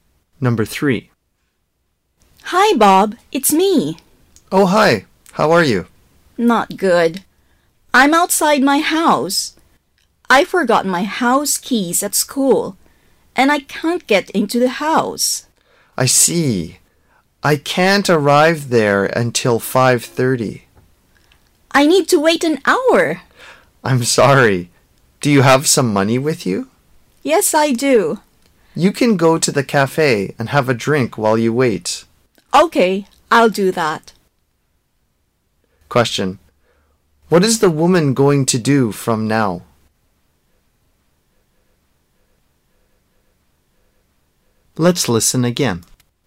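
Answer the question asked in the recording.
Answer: Go to the cafe and have a drink while she waits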